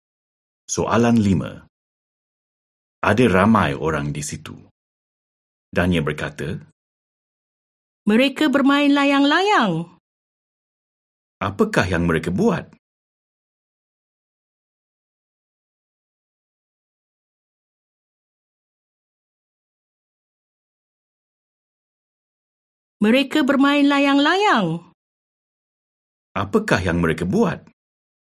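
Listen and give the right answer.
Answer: Bermain layang-layang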